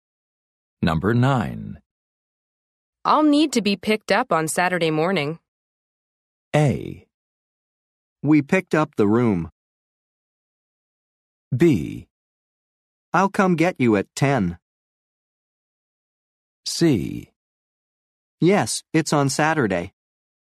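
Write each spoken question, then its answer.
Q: I'll need to be picked up on Saturday morning.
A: B: I'll come get you at 10.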